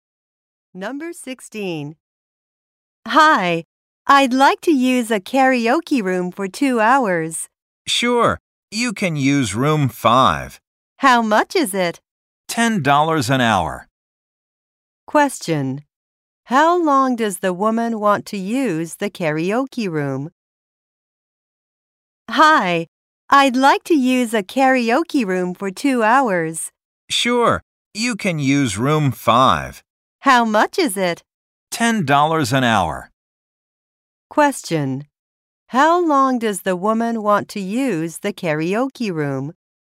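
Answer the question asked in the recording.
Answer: For 2 hours.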